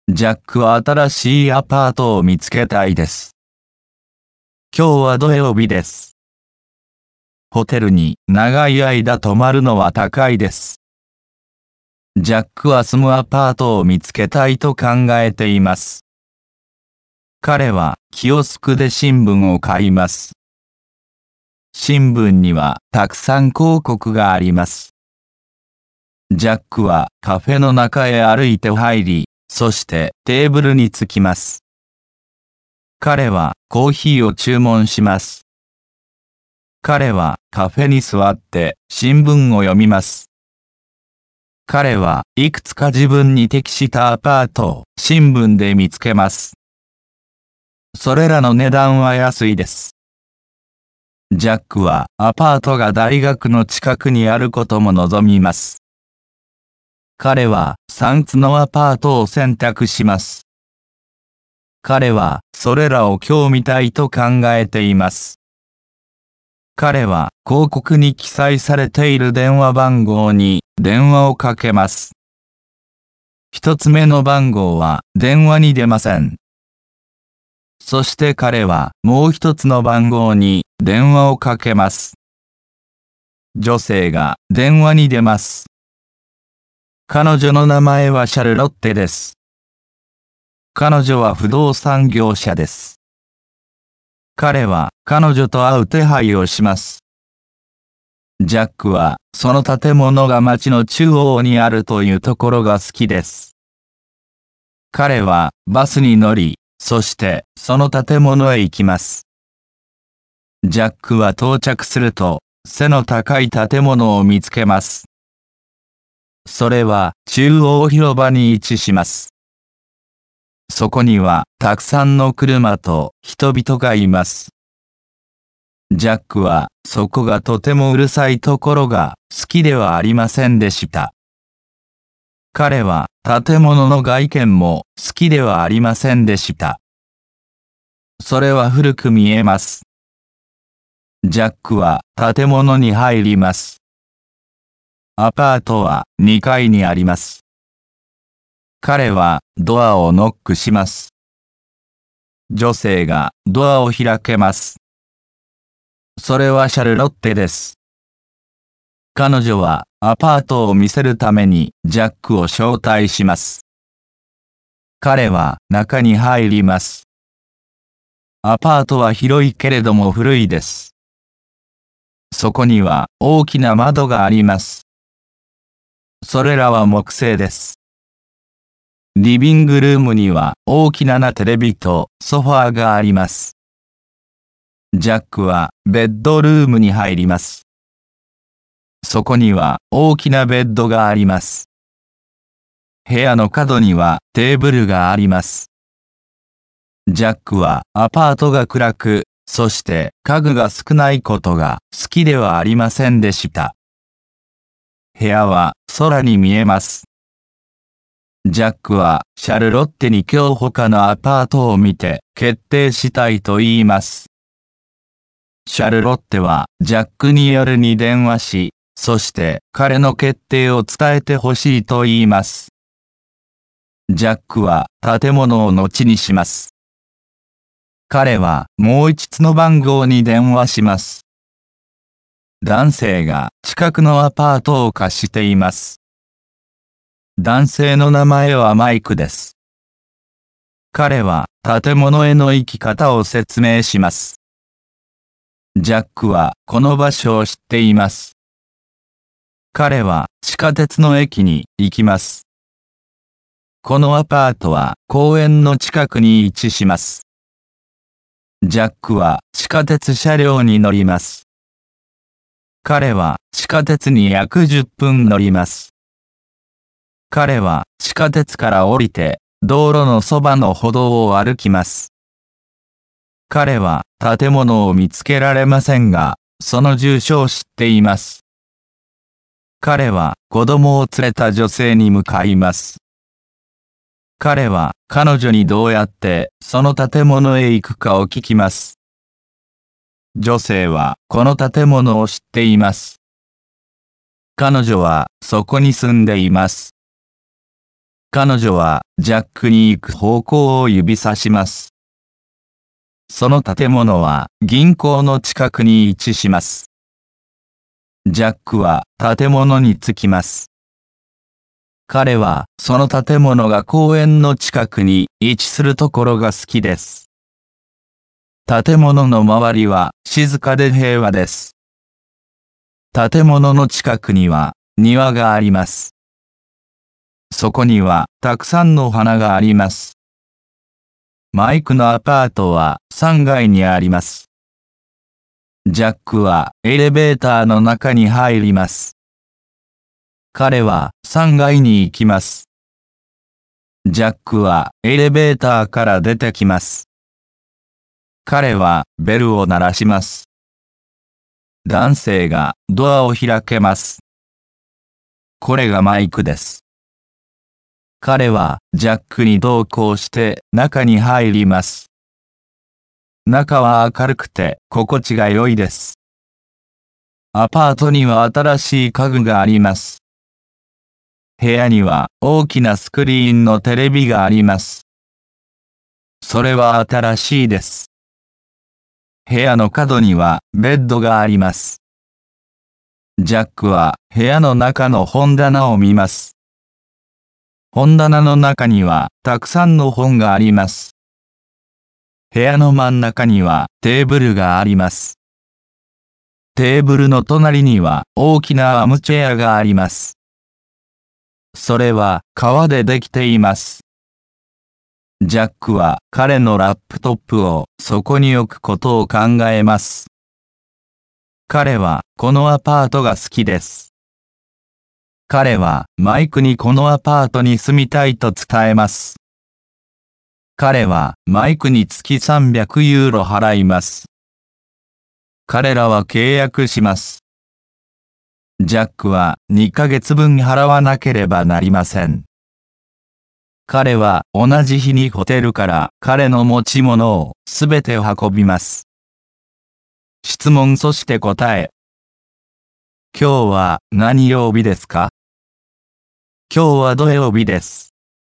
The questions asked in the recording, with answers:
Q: 今日は何曜日ですか?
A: 今日は土曜日です。